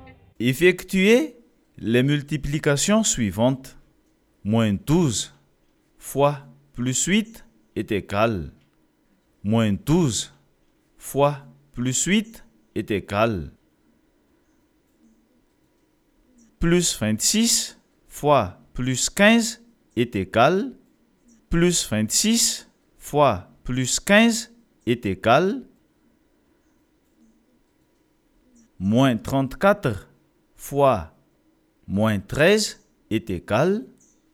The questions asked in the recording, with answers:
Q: Moins 12 fois plus 8 est égal.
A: Moins 12 fois plus 8 est égal moins 96.

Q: Plus 26 fois plus 15 est égal.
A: Plus 26 fois plus 15 est égal plus 390.

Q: Moins 34 fois moins 13 est égal.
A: Moins 34 fois moins 13 est égal plus 442.